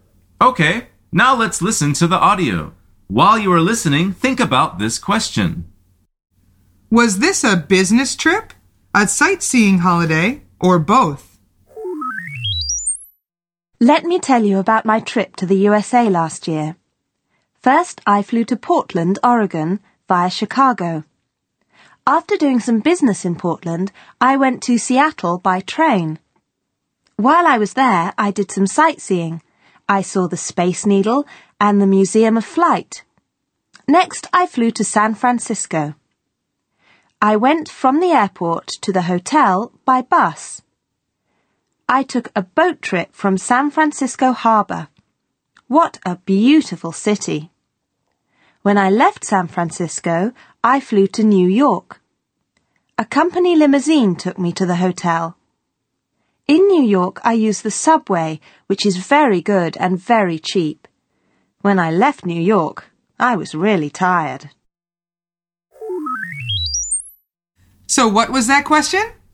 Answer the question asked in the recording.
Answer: The answer is both.